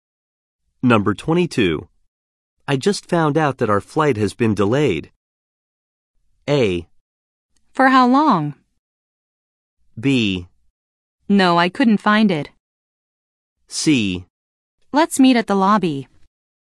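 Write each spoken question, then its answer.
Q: I just found out that our flight has been delayed.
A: A: For how long?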